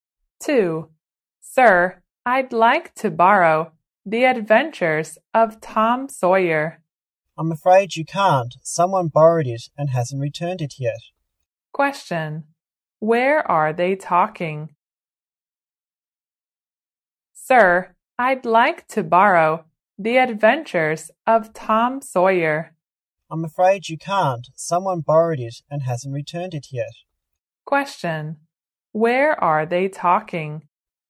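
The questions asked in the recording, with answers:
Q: where are they talking?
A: In a library.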